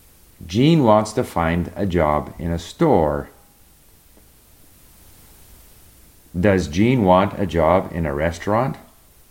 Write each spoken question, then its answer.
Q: Does Jean want a job in a restaurant?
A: No, he doesn't want a job in a restaurant.